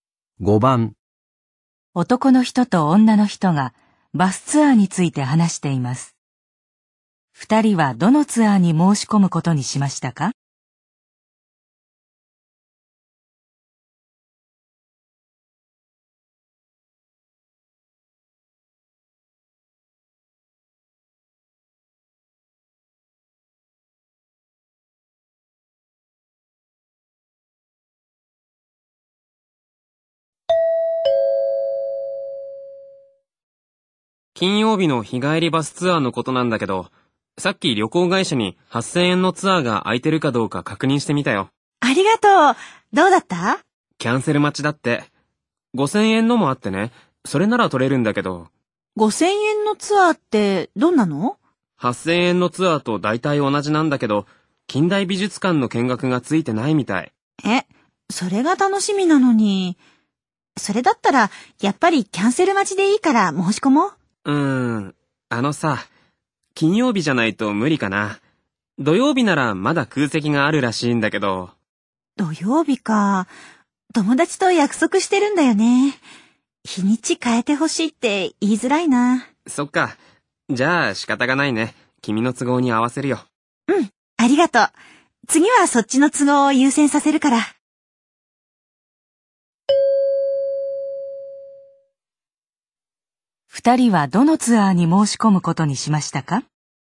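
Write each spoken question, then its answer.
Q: 二人はどのツアーに申し込むことにしましたか?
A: 金曜日の8000円のツアー(キャンセル待ち)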